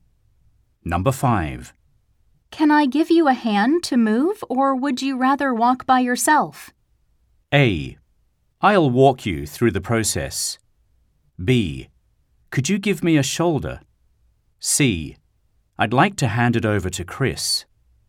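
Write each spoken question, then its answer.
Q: Can I give you a hand to move, or would you rather walk by yourself?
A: B: Could you give me a shoulder?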